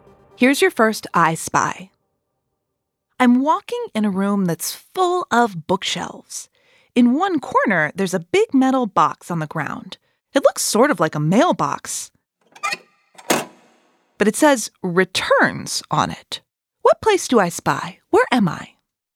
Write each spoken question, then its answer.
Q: What place do I spy?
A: A library! It's a library.